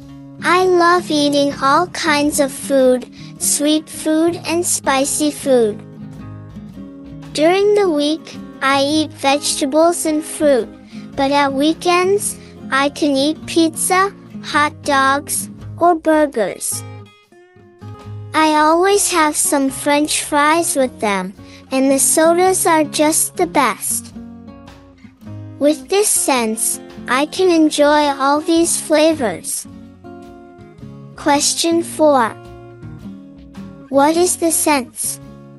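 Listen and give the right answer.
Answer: Taste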